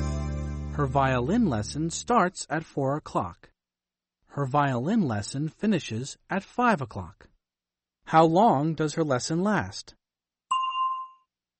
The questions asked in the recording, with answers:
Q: How long does her lesson last?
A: An hour. It lasts an hour.